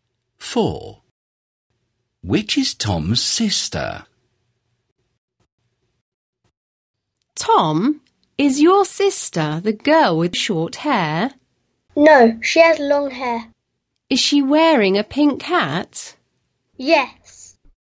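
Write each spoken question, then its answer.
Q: Which is Tom's sister?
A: The girl with long hair and a pink hat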